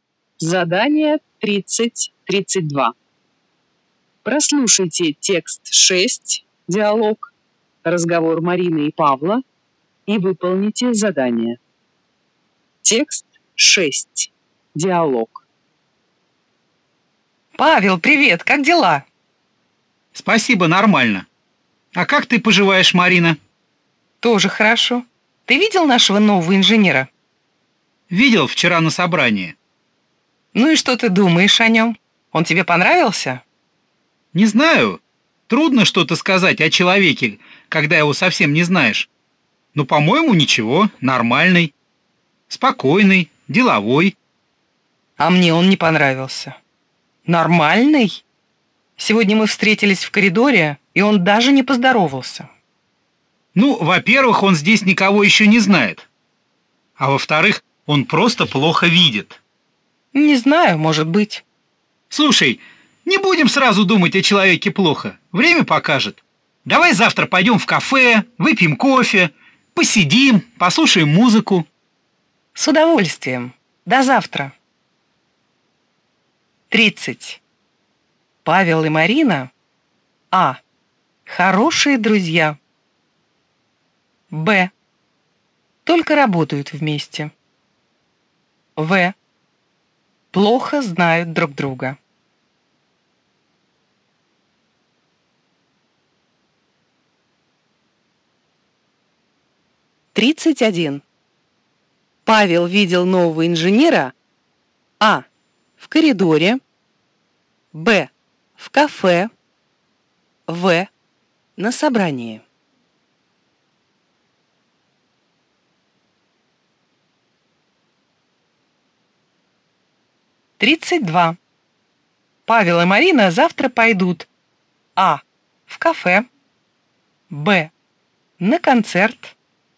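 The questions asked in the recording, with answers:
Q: Павел видел нового инженера А. в коридоре, Б. в кафе, В. на собрании.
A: В: на собрании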